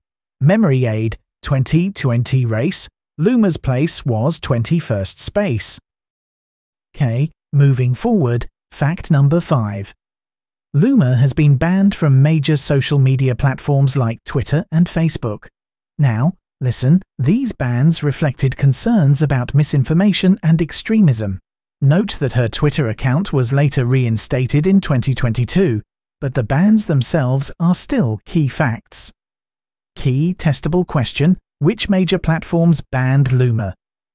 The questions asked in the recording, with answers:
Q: which major platforms banned Loomer?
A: Correct answer, Twitter and Facebook.